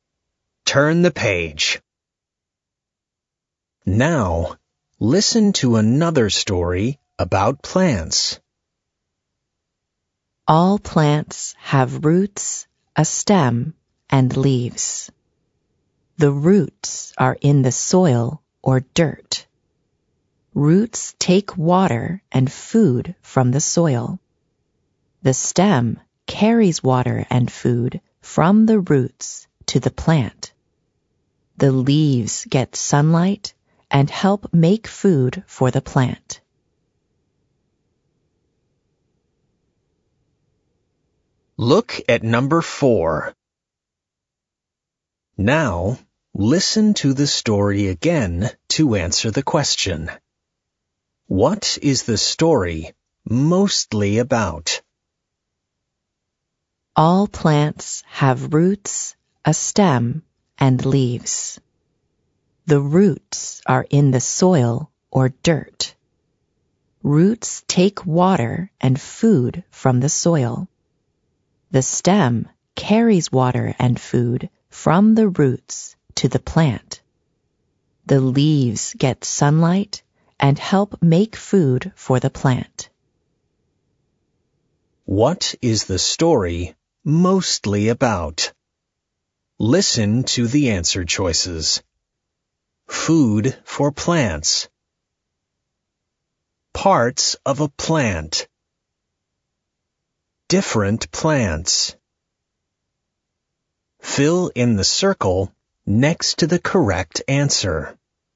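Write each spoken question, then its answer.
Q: What is the story mostly about?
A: B: Parts of a plant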